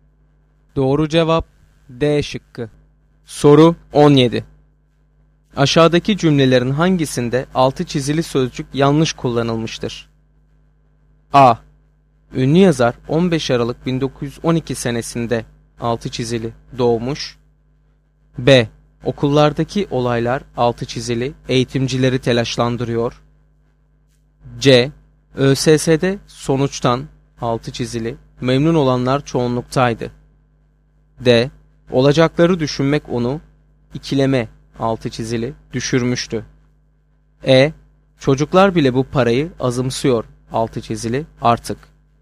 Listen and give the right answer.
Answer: Doğru cevap A şıkkı.